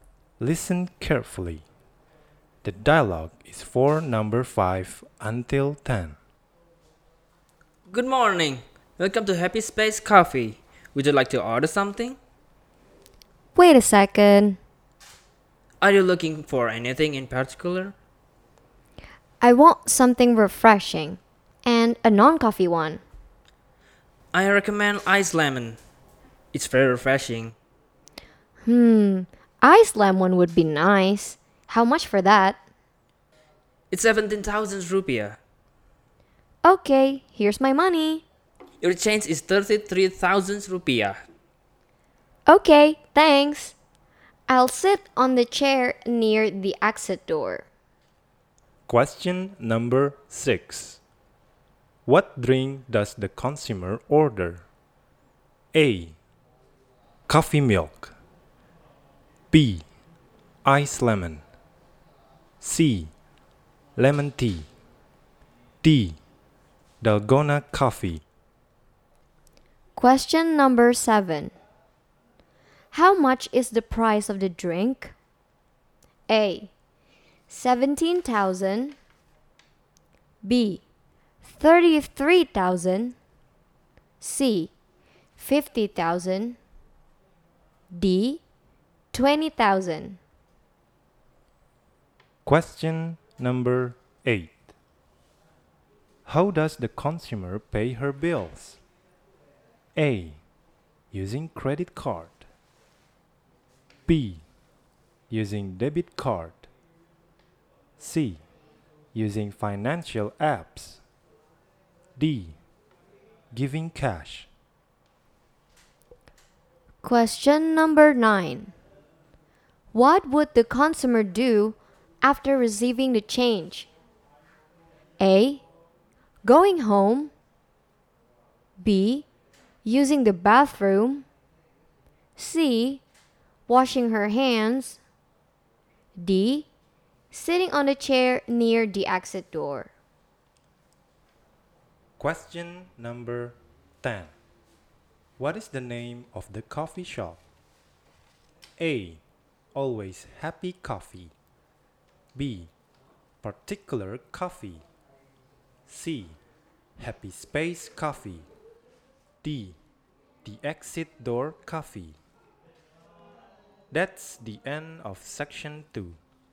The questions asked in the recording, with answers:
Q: What drink does the consumer order?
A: jawaban untuk nomor 6 adalah B.

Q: How much is the price of the drink?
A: Jawaban untuk nomor 7 adalah A.

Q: How does the consumer pay her bills?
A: D. Giving cash.

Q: What would the consumer do after receiving the change?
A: D sitting on the chair near the exit door.

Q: What is the name of the coffee shop?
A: Nomor 10, jawabannya adalah C.